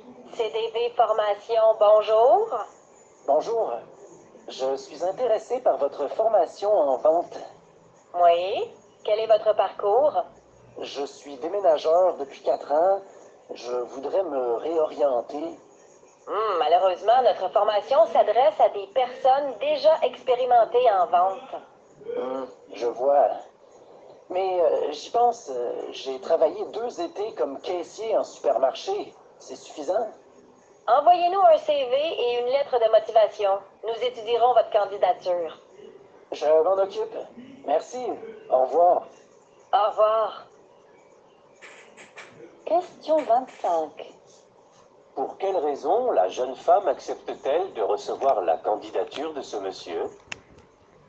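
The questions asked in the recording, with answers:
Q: Pour quelle raison la jeune femme accepte-t-elle de recevoir la candidature de ce monsieur?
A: Parce qu'il a travaillé deux étés comme caissier en supermarché (une petite expérience de vente).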